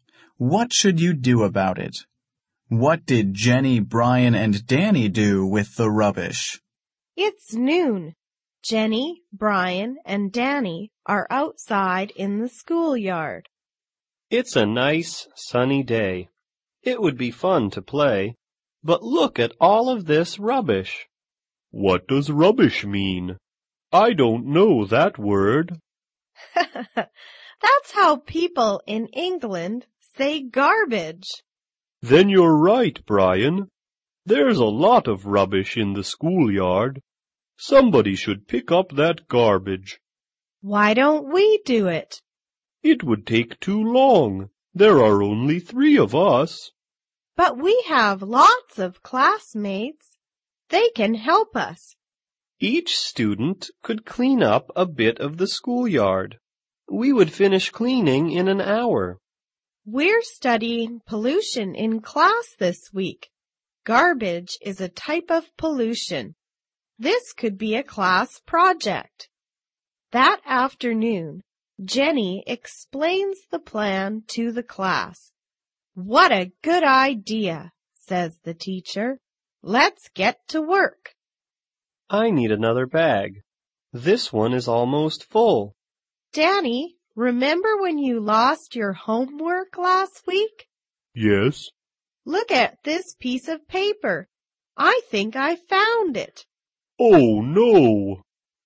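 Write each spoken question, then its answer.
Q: What did Jenny, Brian, and Danny do with the rubbish?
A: They cleaned it up / picked it up with their classmates as a class project.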